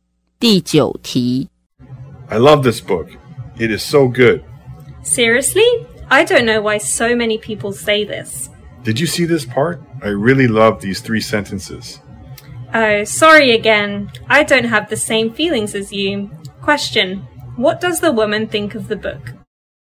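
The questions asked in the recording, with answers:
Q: what does the woman think of the book?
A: She doesn't think it is good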